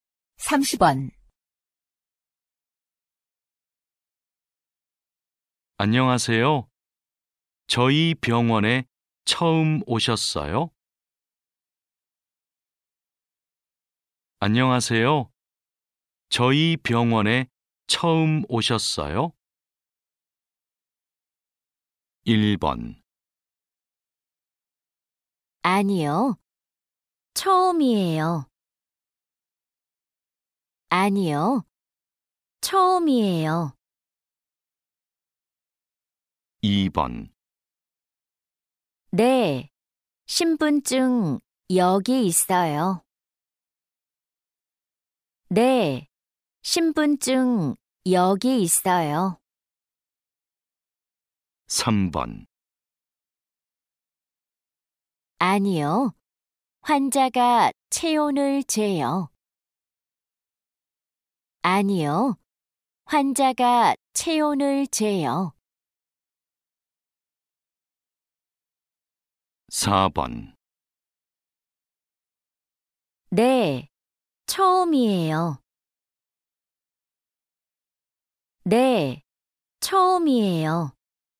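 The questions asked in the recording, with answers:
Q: 안녕하세요. 저희 병원에 처음 오셨어요?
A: 4: 네. 처음이에요.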